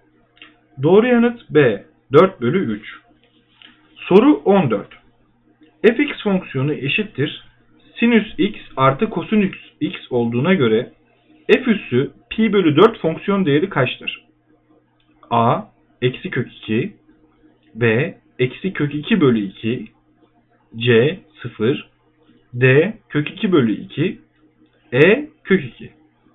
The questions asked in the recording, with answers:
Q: Fx fonksiyonu eşittir sinüs x artı kosinüs x olduğuna göre f üssü pi bölü 4 fonksiyon değeri kaçtır?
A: Doğru yanıt C 0.